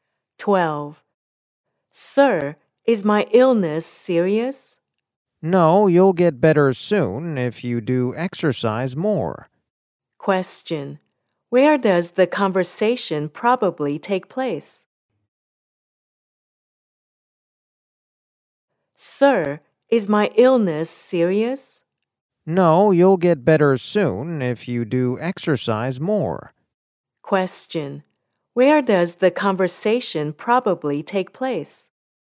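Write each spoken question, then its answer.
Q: Where does the conversation probably take place?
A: In a hospital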